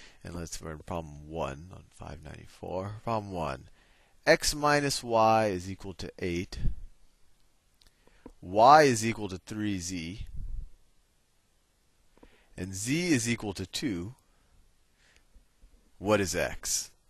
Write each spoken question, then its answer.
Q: What is x?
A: x is equal to 14e